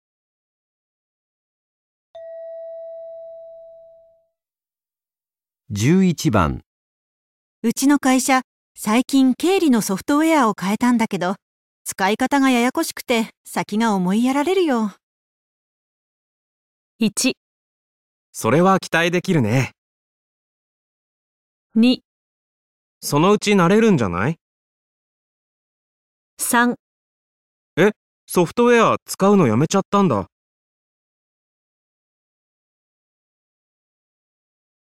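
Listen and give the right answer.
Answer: そのうち慣れるんじゃない?

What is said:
3. え?ソフトウェアは使うのやめちゃったんだ

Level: N1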